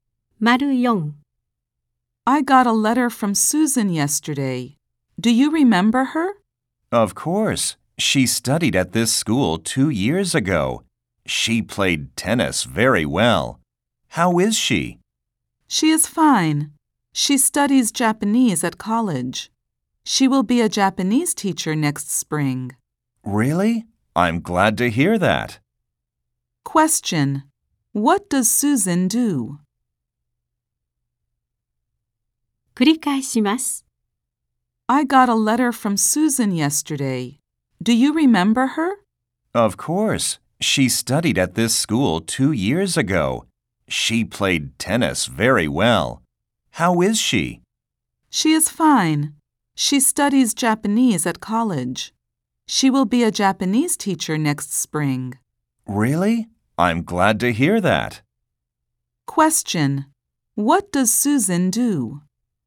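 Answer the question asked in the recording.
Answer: She studies Japanese at college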